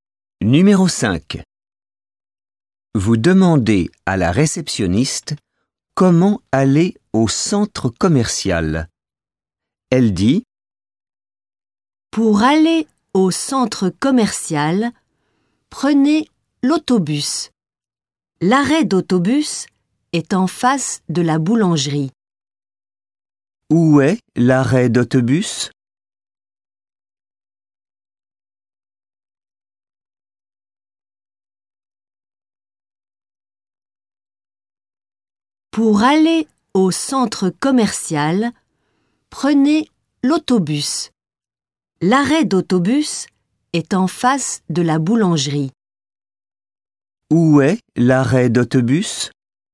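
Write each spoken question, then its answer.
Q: Où est l'arrêt d'autobus?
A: En face de la boulangerie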